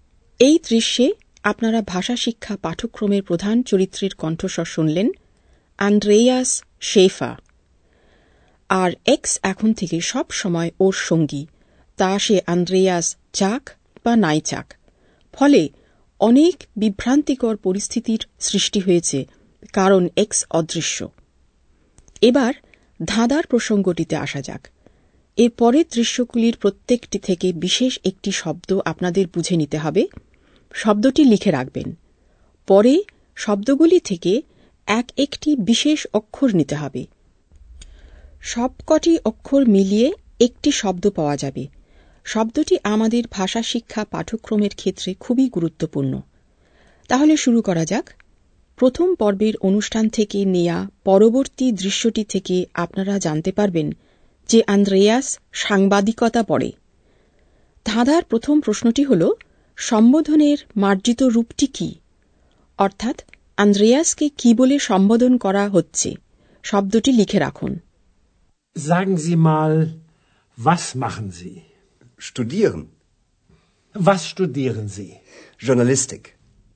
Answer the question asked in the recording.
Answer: শব্দটি হল জি আপনি